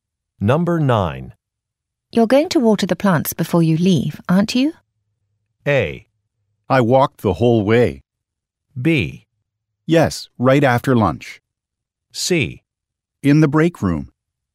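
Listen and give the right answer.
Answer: B: Yes, right after lunch.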